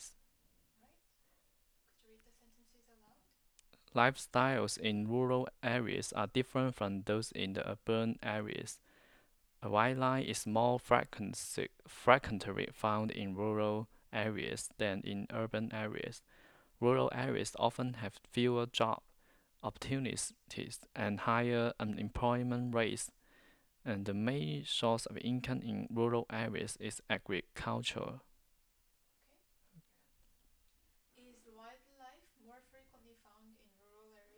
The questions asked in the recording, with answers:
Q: Is wildlife more frequently found in rural areas?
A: Yes, the wildlife is found more frequently in the rural areas.